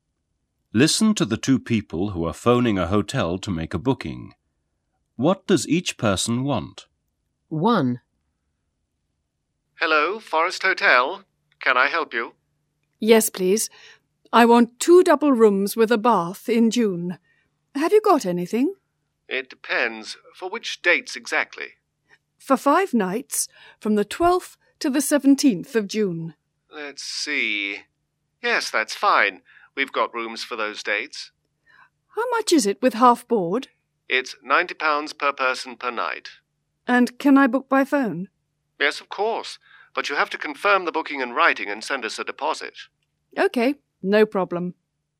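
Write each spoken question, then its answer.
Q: What does each person want?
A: Two double rooms with a bath, half board, for 5 nights from 12th to 17th June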